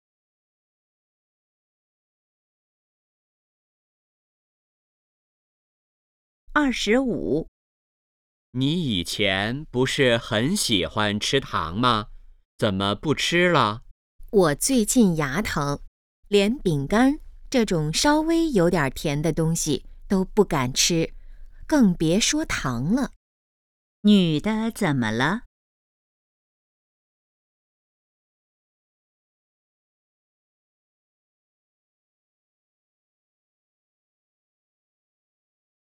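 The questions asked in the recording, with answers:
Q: 女的怎么了?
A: 牙疼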